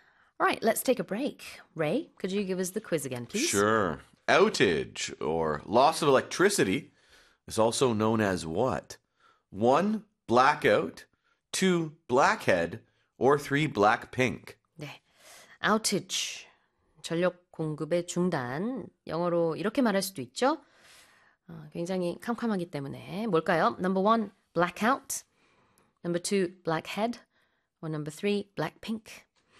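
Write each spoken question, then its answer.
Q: Outage or loss of electricity is also known as what?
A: One: blackout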